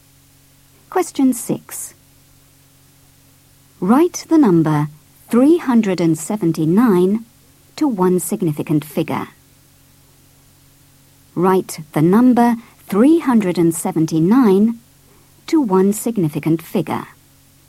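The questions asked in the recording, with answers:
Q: Write the number 379 to one significant figure.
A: 400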